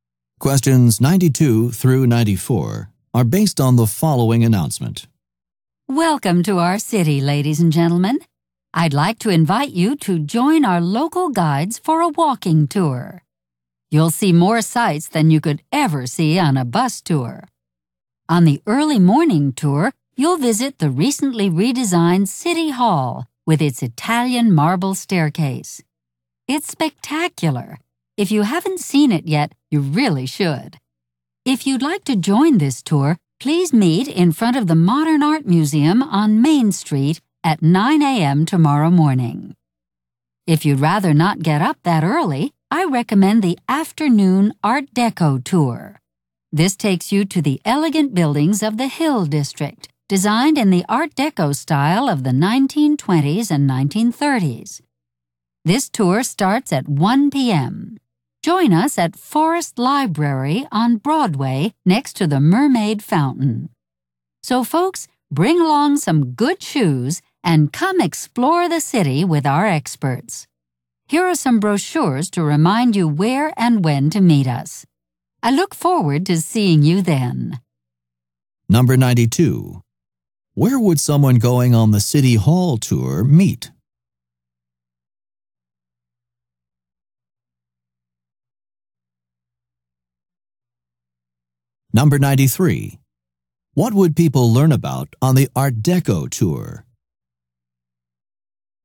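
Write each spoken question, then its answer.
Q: Where would someone going on the City Hall tour meet?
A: In front of the Modern Art Museum on Main Street

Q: What would people learn about on the Art Deco tour?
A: Art Deco buildings of the Hill District from the 1920s and 1930s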